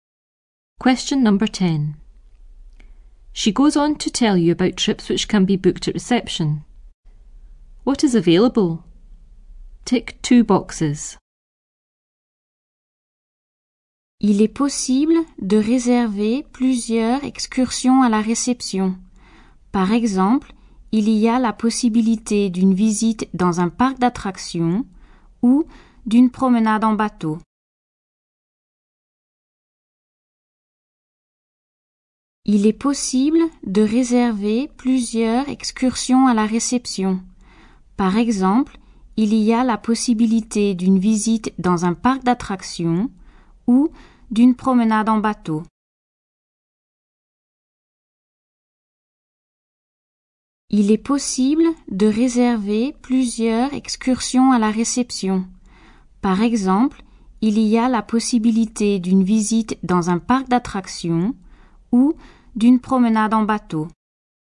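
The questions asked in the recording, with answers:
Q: What is available?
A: A visit to a theme park and a boat trip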